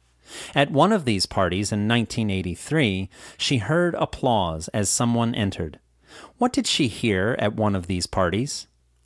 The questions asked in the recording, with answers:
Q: What did she hear at one of these parties?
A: She heard applause as someone entered at one of these parties.